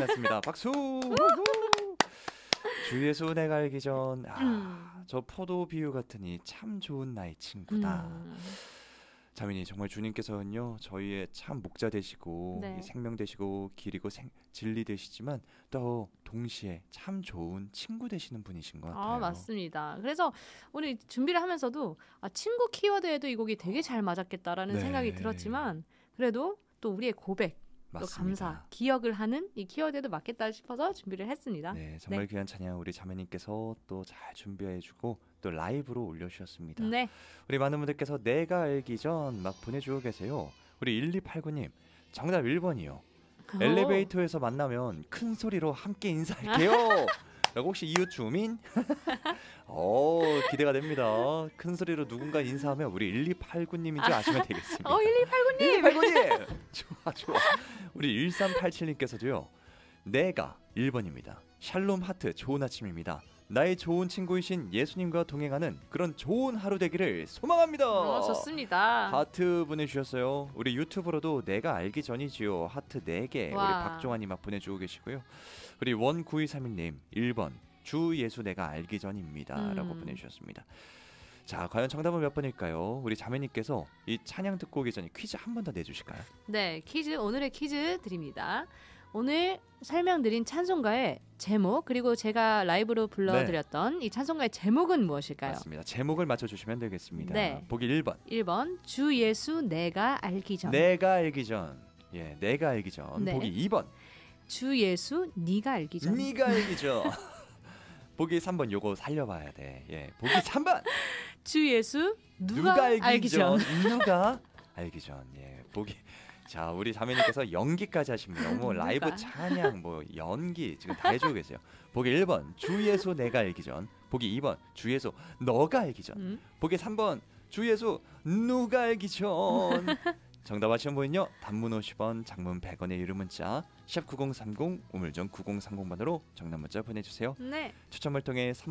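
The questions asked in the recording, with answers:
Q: 오늘 설명드린 찬송가의 제목 그리고 제가 라이브로 불러드렸던 네. 이 찬송가의 제목은 무엇일까요?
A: 1: 주 예수 내가 알기 전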